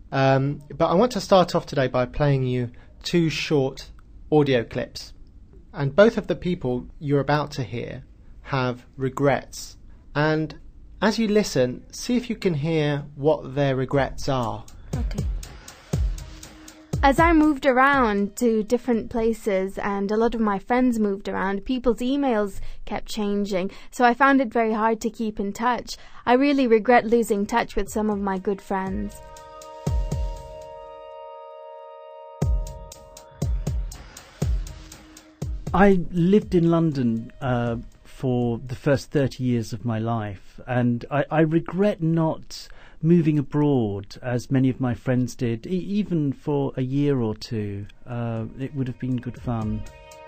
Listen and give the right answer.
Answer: Very good, yes. She regrets losing touch with some of her good friends.